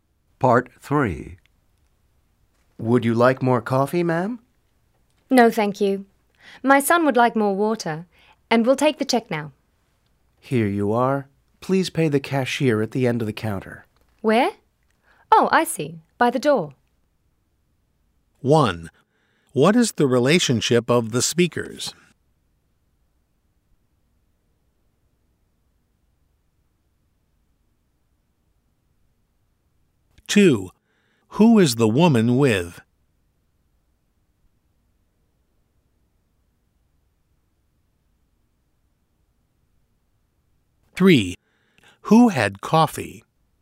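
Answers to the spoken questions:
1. Waiter and customer
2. Her son
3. The woman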